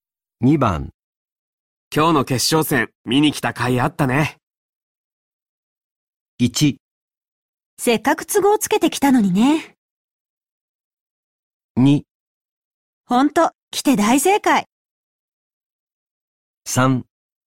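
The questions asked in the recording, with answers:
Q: 今日の決勝戦見に来た甲斐あったね。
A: 2: ほんと来て大正解。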